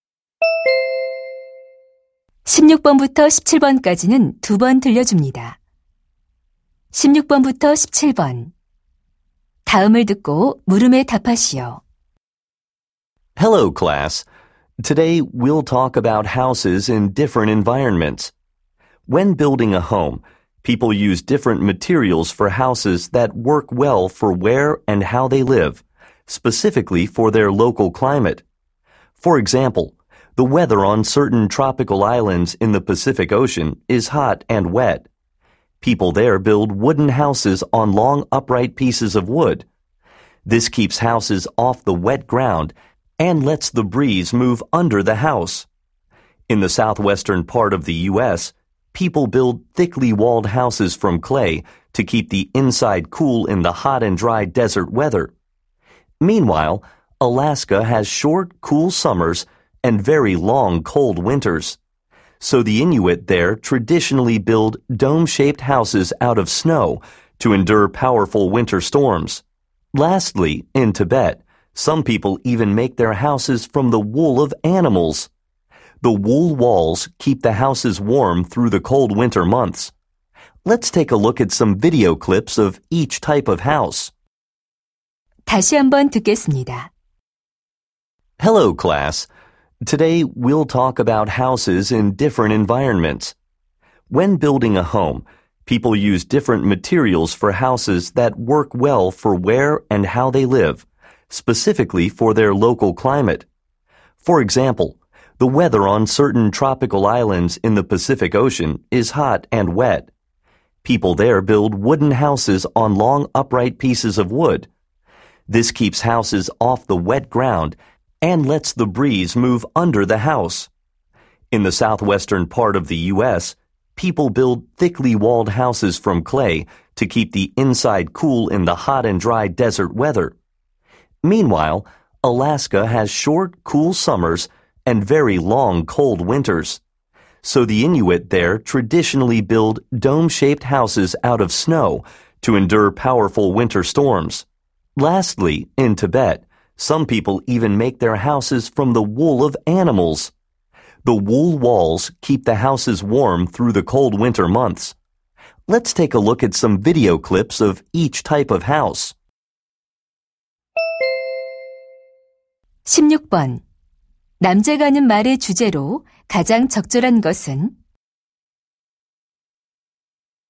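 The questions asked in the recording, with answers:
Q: 남자가 하는 말의 주제로 가장 적절한 것은?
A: 기후에 따라 다른 재료로 지은 집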